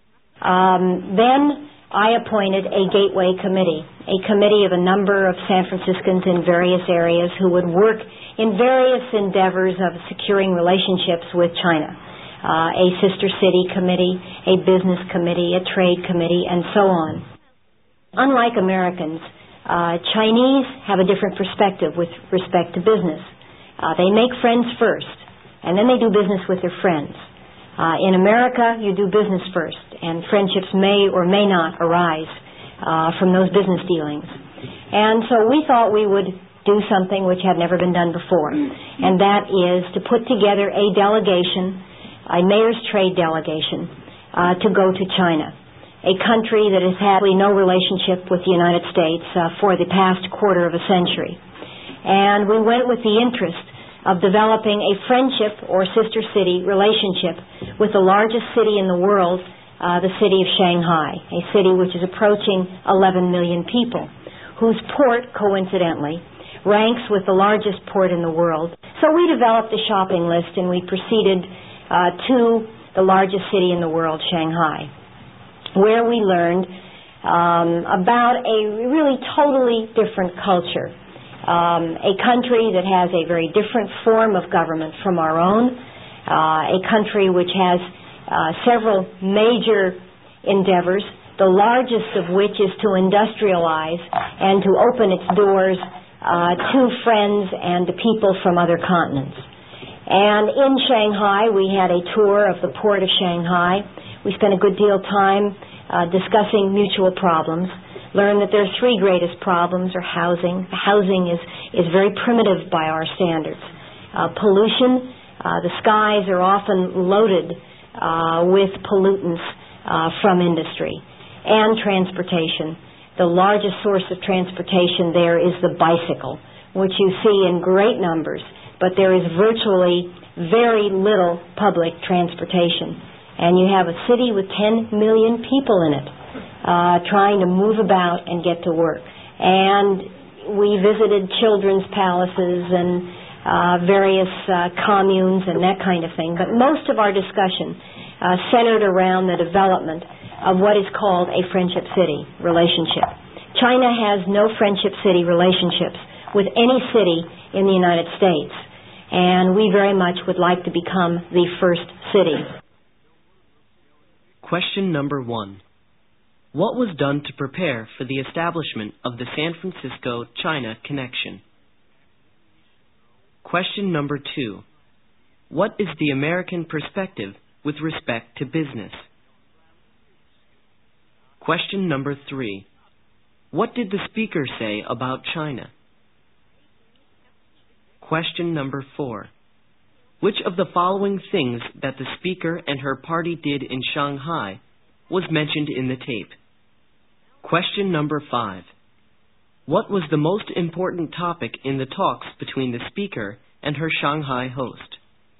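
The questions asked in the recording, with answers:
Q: What was done to prepare for the establishment of the San Francisco-China connection?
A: A gateway committee was appointed

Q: What is the American perspective with respect to business?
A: Do business first; friendships may or may not follow

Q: What was the most important topic in the talks between the speaker and her Shanghai host?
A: Developing a friendship city relationship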